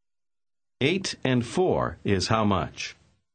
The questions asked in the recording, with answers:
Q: Eight and four is how much?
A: 12.